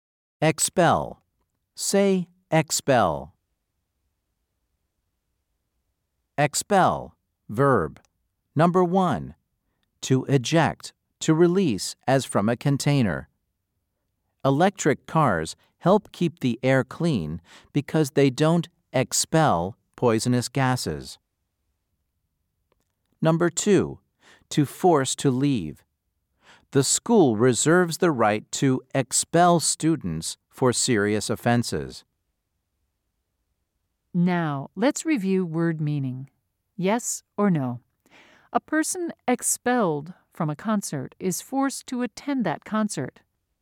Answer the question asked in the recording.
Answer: If you said no, you were correct.